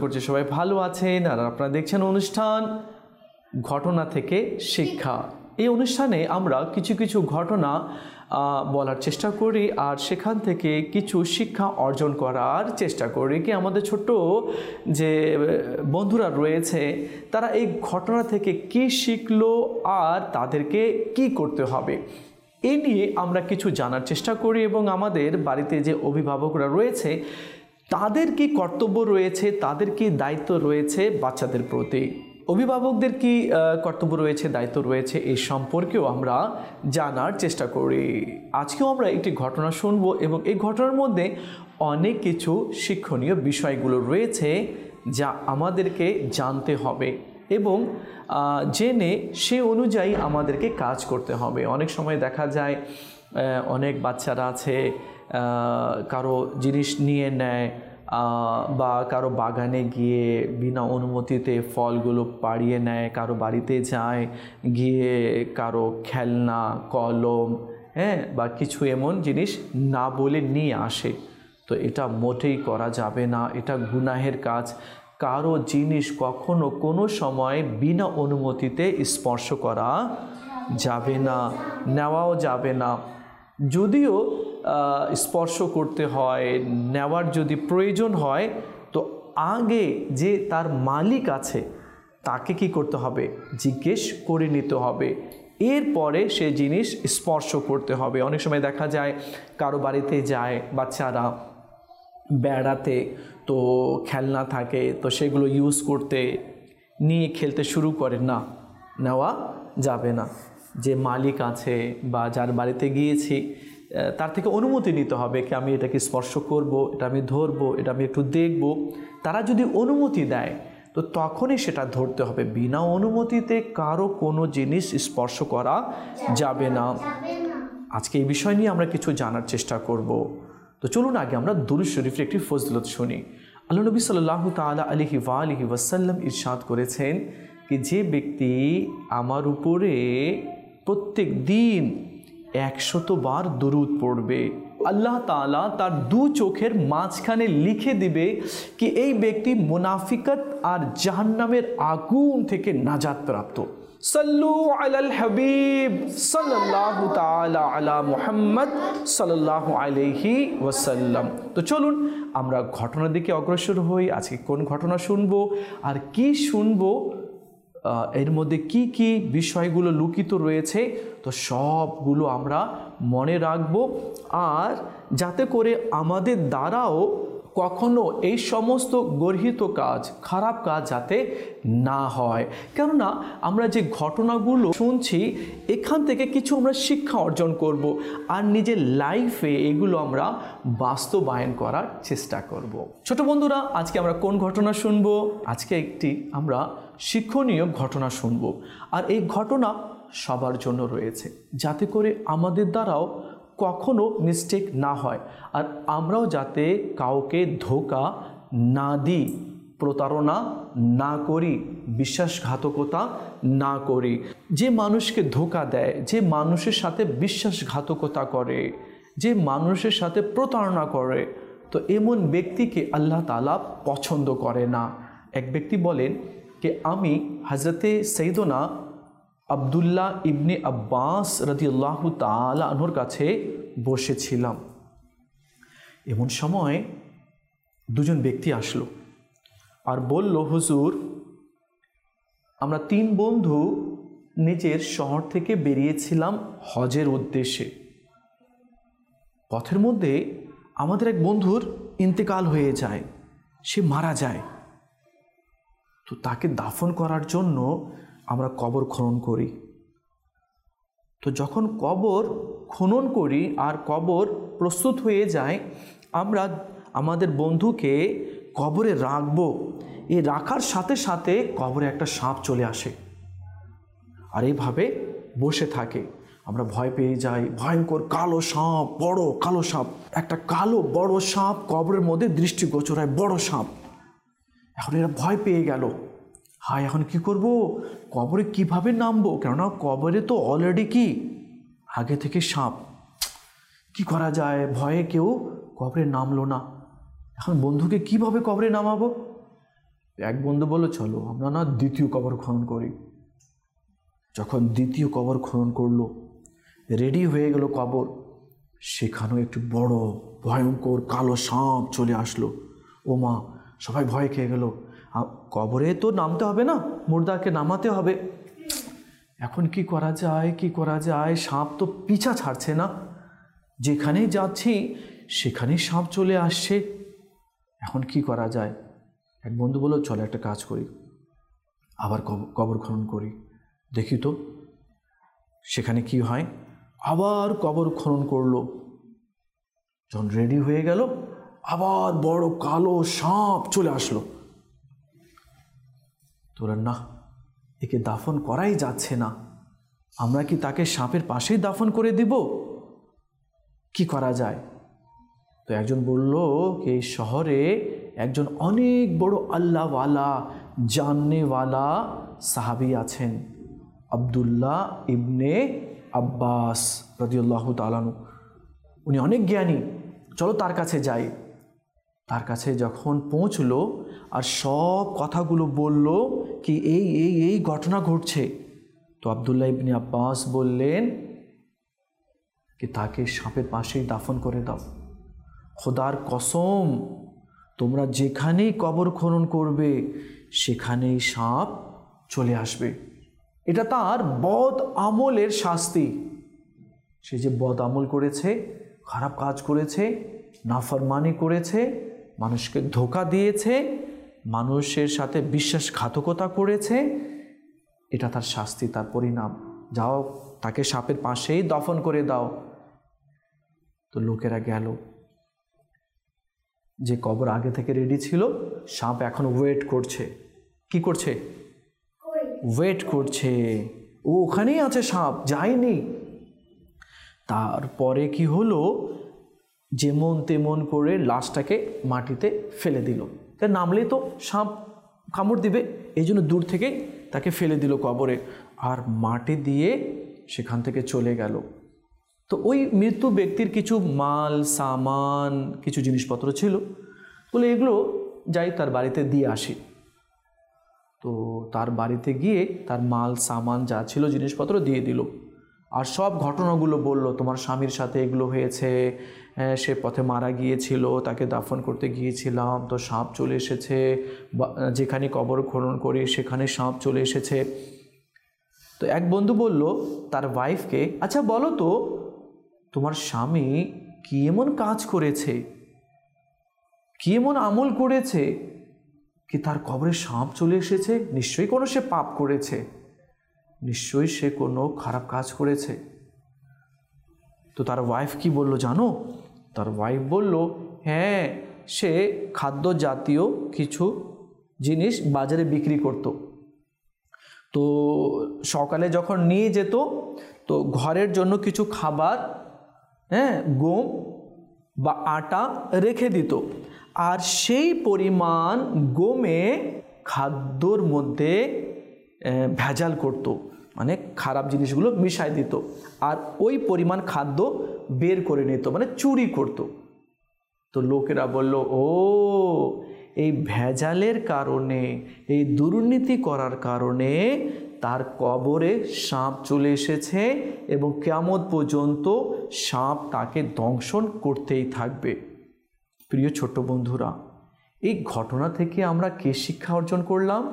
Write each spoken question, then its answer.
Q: প্রিয় ছোট বন্ধুরা, এই ঘটনা থেকে আমরা কি শিক্ষা অর্জন করলাম?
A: মানুষকে কখনো কোনো সময় প্রতারণা করা যাবে না, কারো জিনিসে আত্মসাৎ করা যাবে না।